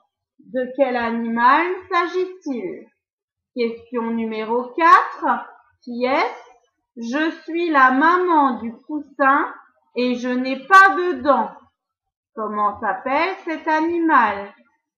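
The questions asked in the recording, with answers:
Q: Comment s'appelle cet animal?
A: la poule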